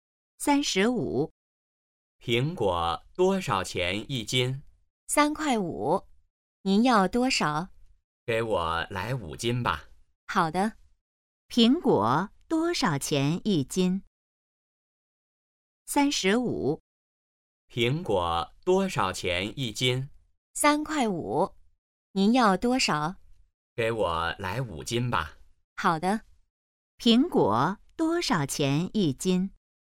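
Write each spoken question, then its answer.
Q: 苹果多少钱一斤?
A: 3.5元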